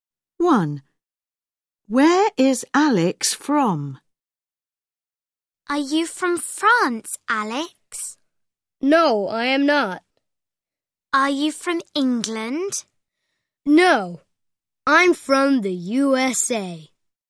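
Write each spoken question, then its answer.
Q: Where is Alex from?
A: the USA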